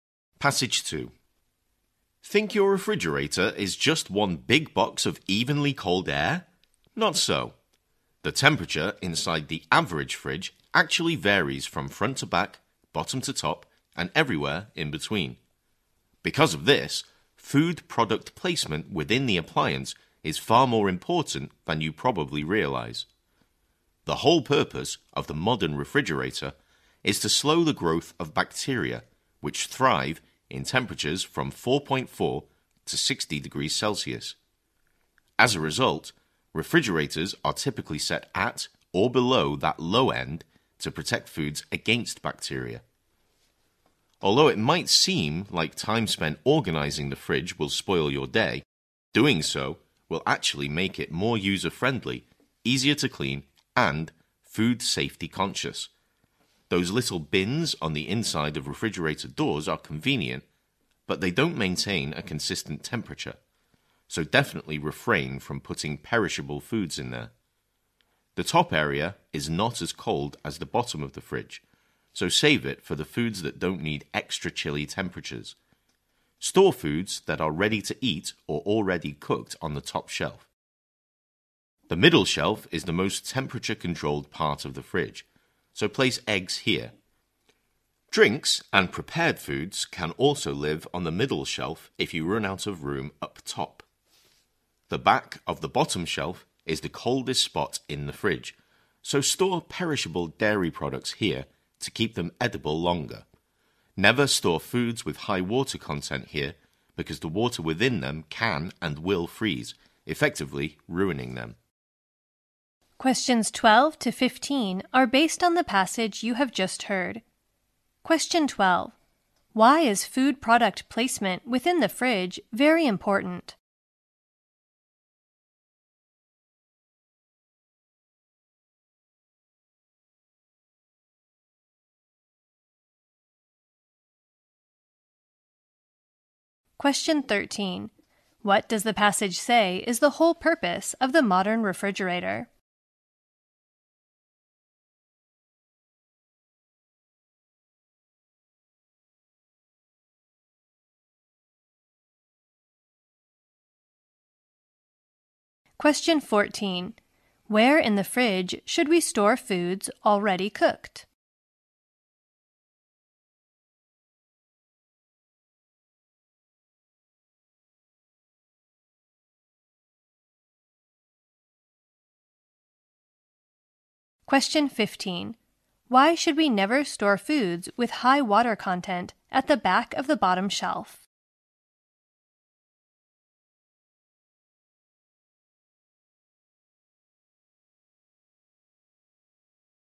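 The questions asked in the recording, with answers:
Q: Why is food product placement within the fridge very important?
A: The temperature varies in different parts of the fridge.

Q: What does the passage say is the whole purpose of the modern refrigerator?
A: To slow the growth of bacteria.

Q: Where in the fridge should we store foods already cooked?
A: On the top shelf.

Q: Why should we never store foods with high water content at the back of the bottom shelf?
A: The water in them will freeze and ruin them.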